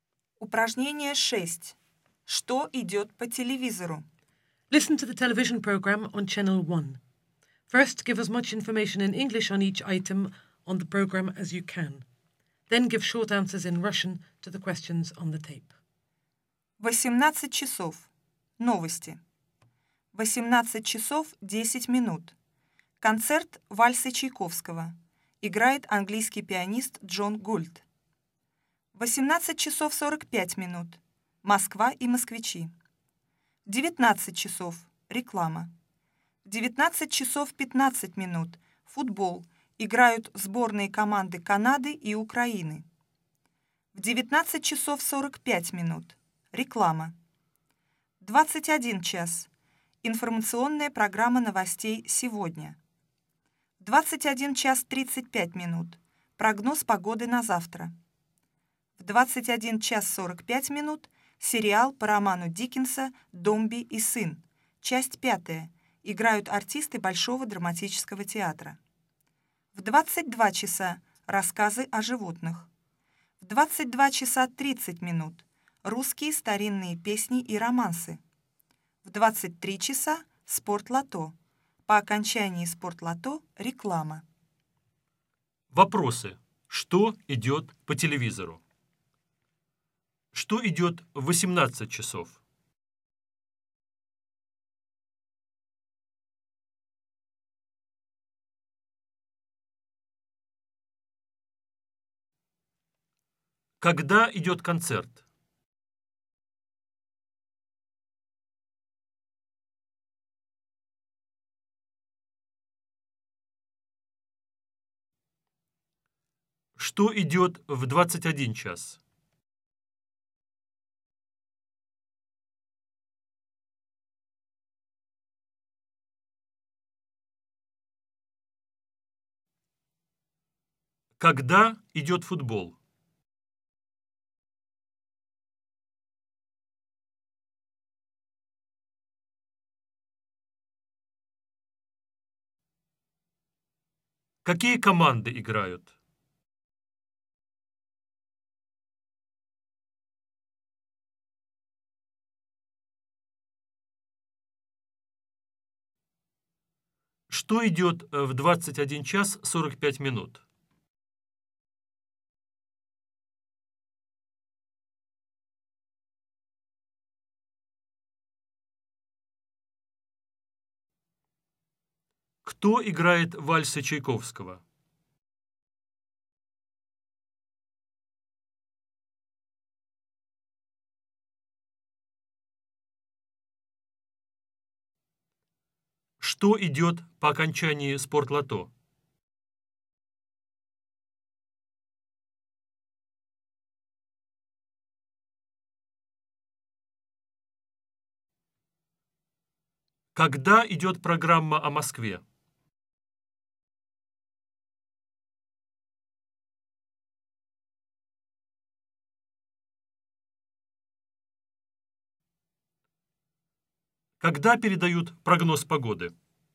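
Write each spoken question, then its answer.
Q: Что идет в 18:00?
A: Новости

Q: Когда идет концерт?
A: В 18 часов 10 минут

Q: Что идет в 21:00?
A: Информационная программа новостей «Сегодня»

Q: Когда идет футбол?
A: В 19 часов 15 минут

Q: Какие команды играют?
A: Сборные команды Канады и Украины

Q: Что идет в 21:45?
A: Сериал по роману Диккенса «Домби и сын», часть 5

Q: Кто играет вальсы Чайковского?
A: Английский пианист Джон Гульд

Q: Что идет по окончании спортлото?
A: Реклама

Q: Когда идет программа о Москве?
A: В 18 часов 45 минут

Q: Когда передают прогноз погоды?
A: В 21:35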